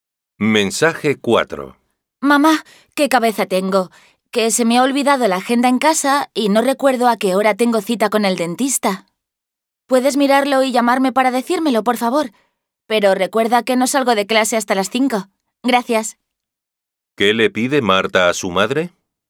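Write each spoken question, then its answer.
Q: ¿Qué le pide Marta a su madre?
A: Que mire en su agenda la hora de la cita con el dentista y la llame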